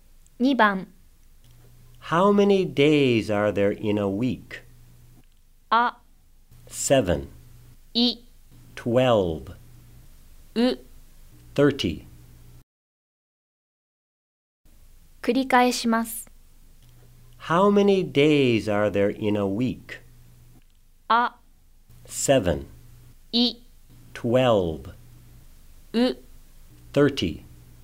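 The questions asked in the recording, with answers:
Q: How many days are there in a week?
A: あ: 7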